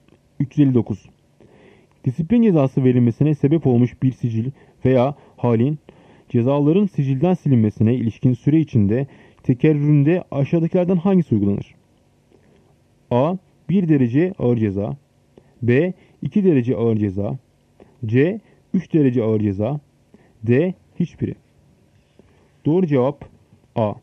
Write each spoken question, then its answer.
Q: Disiplin cezası verilmesine sebep olmuş bir sicil veya halin cezaların sicilden silinmesine ilişkin süre içinde tekerrüründe aşağıdakilerden hangisi uygulanır?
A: Doğru cevap A. 1 derece ağır ceza.